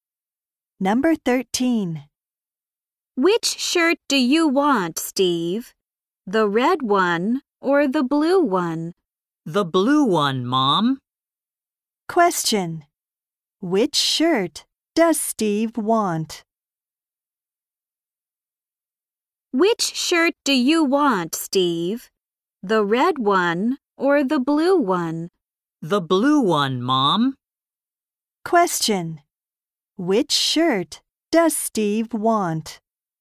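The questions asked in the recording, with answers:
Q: Which shirt does Steve want?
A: The blue one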